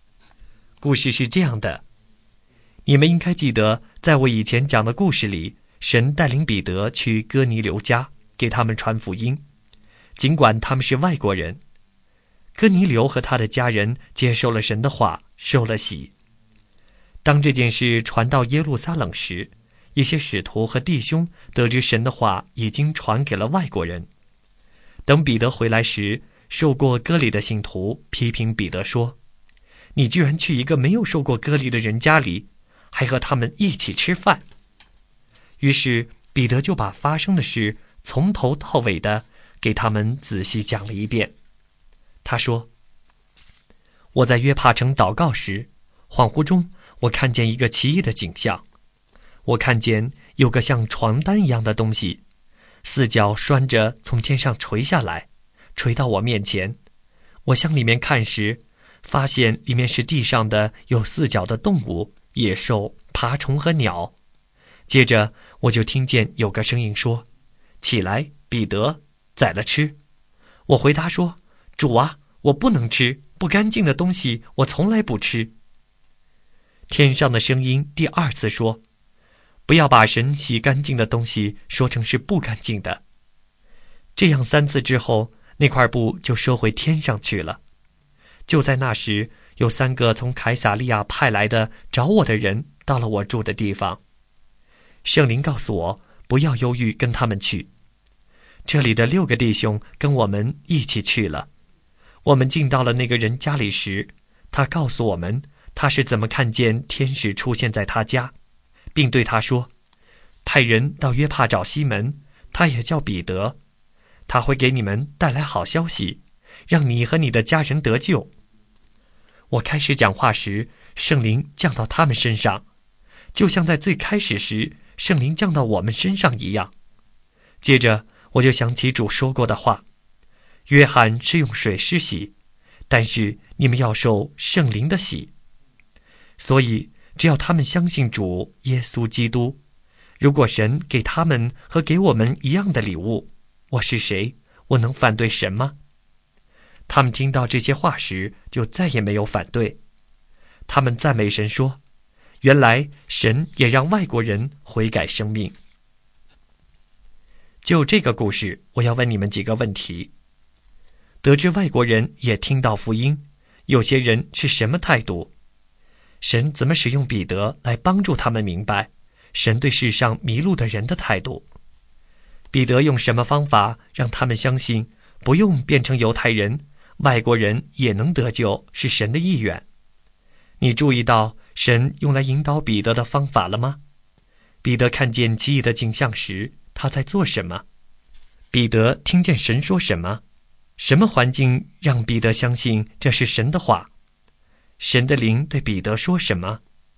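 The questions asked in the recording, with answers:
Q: 得知外国人也听到福音,有些人是什么态度?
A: 受过割礼的信徒批评彼得去没受割礼的人家里并和他们一起吃饭

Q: 彼得看见奇异的景象时,他在做什么?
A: 在约帕城祷告

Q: 彼得听见神说什么?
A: 起来,彼得,宰了吃;不要把神洗干净的东西说成是不干净的

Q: 神的灵对彼得说什么?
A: 不要犹豫,跟他们去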